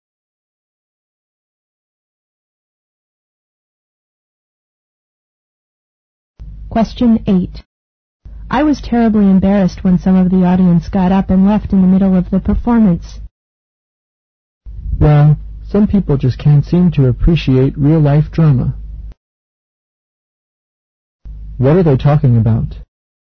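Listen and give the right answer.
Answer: A play (a drama performance) that some audience members walked out of.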